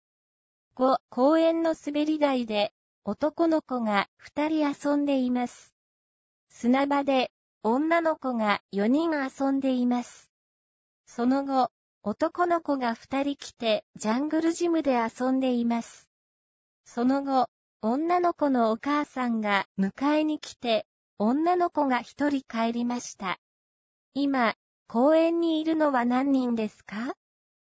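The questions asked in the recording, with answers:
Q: 今、公園にいるのは何人ですか?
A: 7人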